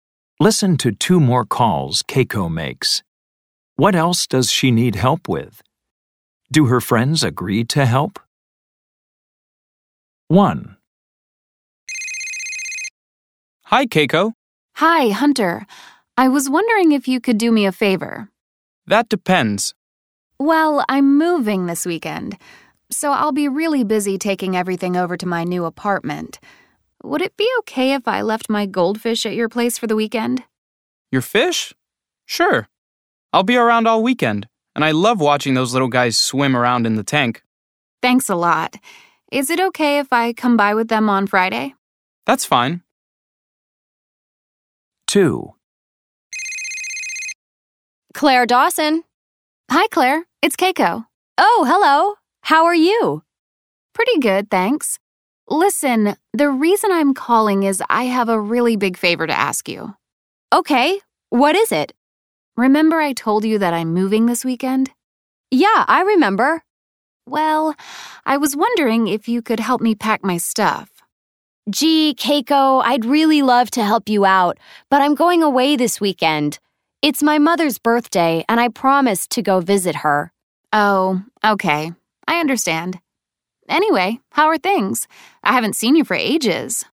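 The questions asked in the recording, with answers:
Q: What else does she need help with?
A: Keeping her goldfish for the weekend

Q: Do her friends agree to help?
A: Yes, Hunter agrees

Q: What else does she need help with?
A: Packing her stuff

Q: Do her friends agree to help?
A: No, Claire is going away to visit her mother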